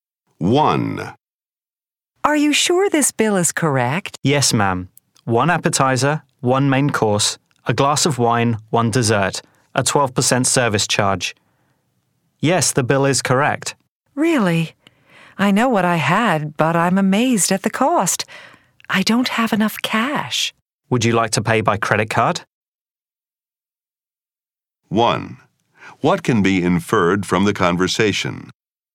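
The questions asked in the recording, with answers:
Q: What can be inferred from the conversation?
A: The woman thinks the meal is too expensive, though the bill is correct.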